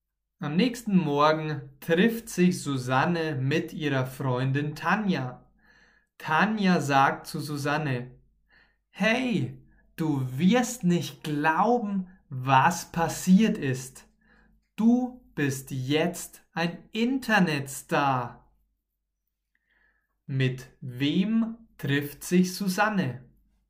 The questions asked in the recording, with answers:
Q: Mit wem trifft sich Susanne?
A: Mit Tanja. Susanne trifft sich mit Tanja.